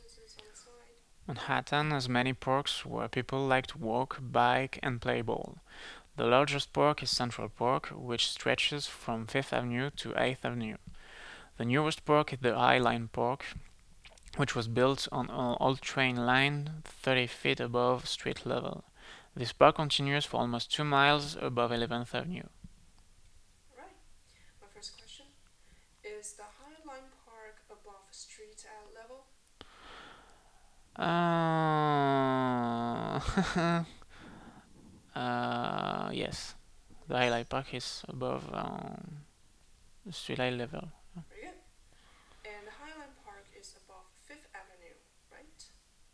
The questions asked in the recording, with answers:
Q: And the High Line Park is above 5th Avenue, right?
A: The High Line Park is... above 11th Avenue, not 5th Avenue.